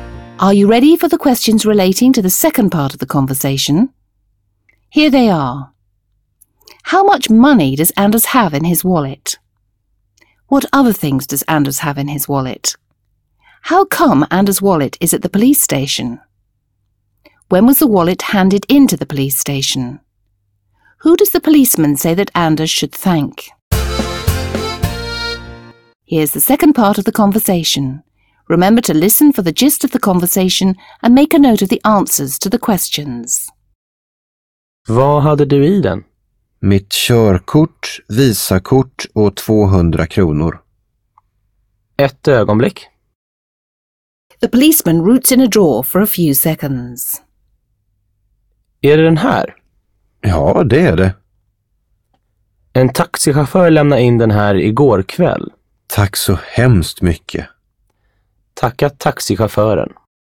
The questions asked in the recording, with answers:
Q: How much money does Anders have in his wallet?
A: Anders has 200 kronor in his wallet.

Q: What other things does Anders have in his wallet?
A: Anders also has his driver's license and a Visa credit card in his wallet.

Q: How come Anders' wallet is at the police station?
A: It was a taxi driver who handed in the wallet.

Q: When was the wallet handed in to the police station?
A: The wallet was handed in last night.

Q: Who does the policeman say that Anders should thank?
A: The policeman naturally thinks that Anders should thank the taxi driver.